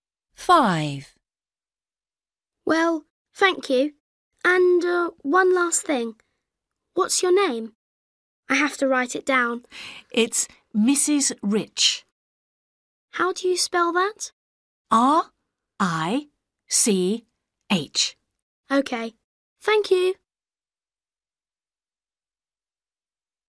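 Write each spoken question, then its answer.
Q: What's your name? I have to write it down.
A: Rich (Mrs. Rich)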